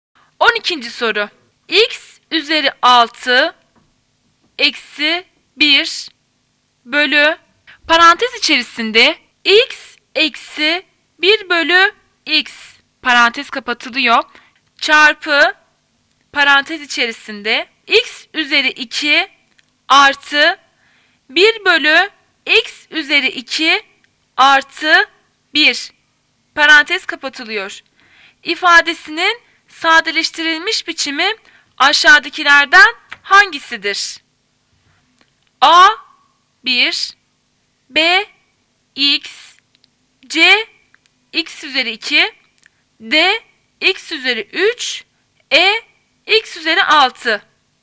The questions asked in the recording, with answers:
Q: İfadesinin sadeleştirilmiş biçimi aşağıdakilerden hangisidir?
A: Cevap şıkkı D. X üzeri 3.